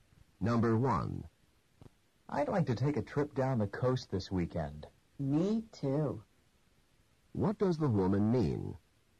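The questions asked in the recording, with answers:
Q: What does the woman mean?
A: She also wants to take a trip down the coast.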